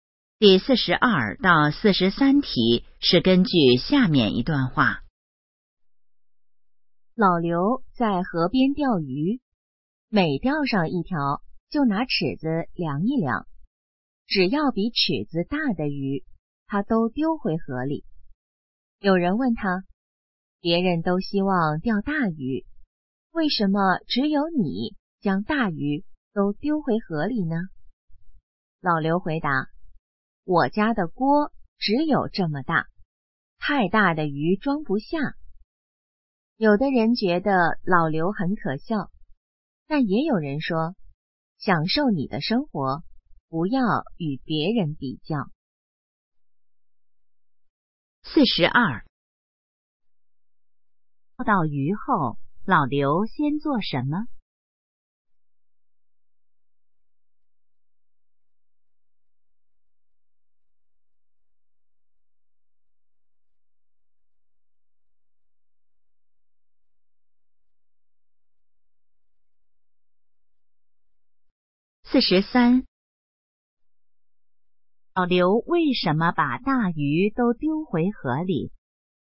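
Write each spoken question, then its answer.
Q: 钓到鱼后,老刘先做什么?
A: 拿尺子量一量

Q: 老刘为什么把大鱼都丢回河里?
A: 家里的锅太小,装不下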